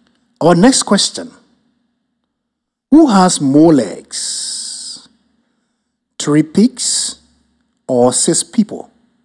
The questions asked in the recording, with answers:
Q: Who has more legs? Three pigs or six people?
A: So, three pigs and six people have an equal number of legs.